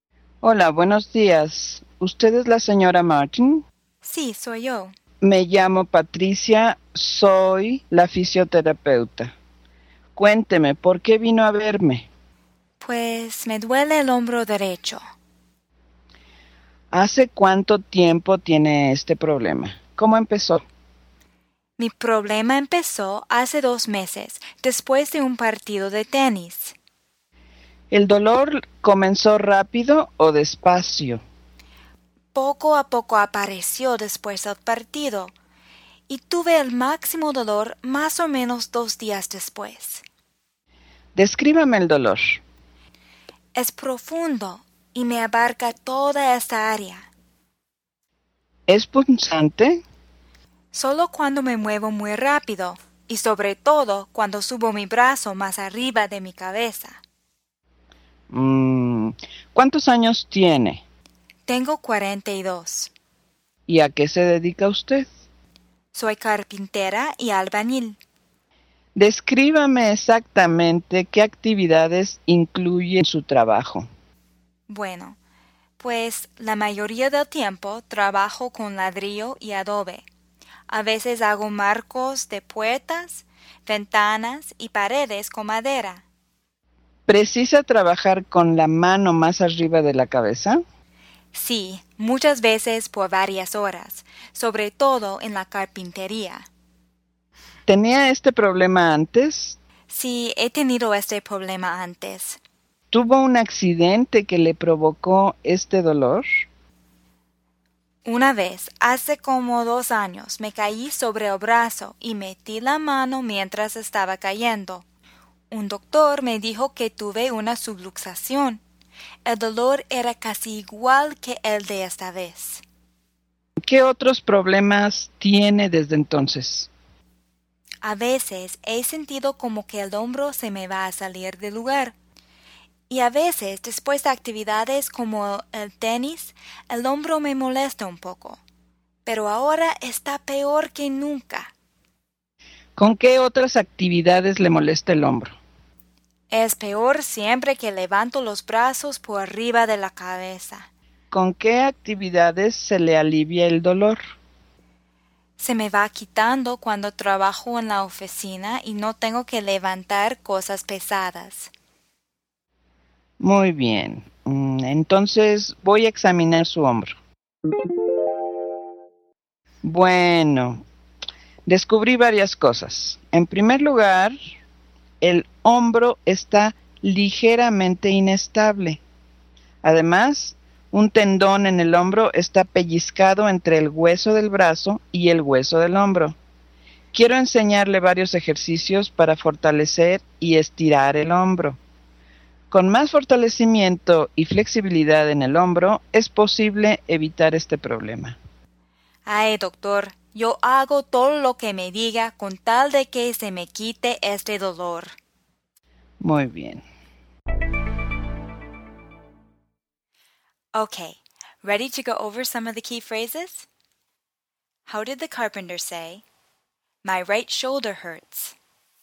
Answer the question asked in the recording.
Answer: Me duele el hombro derecho.